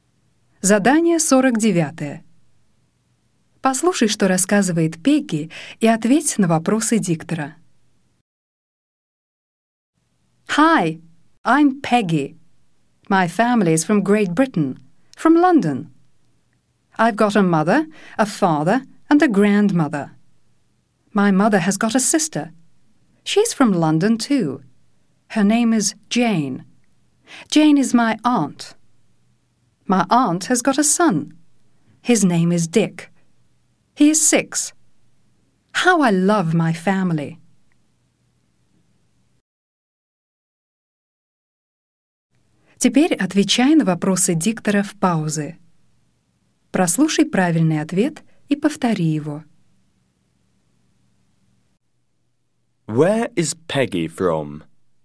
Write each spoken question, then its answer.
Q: Where is Peggy from?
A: She's from Great Britain.